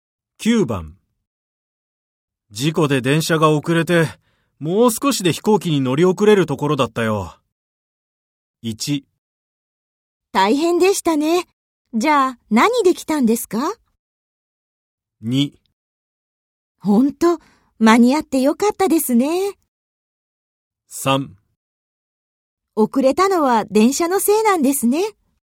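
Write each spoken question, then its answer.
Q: 事故で電車が遅れてもう少しで飛行機に乗り遅れるところだったよ。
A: 2: ほんと間に合ってよかったですね。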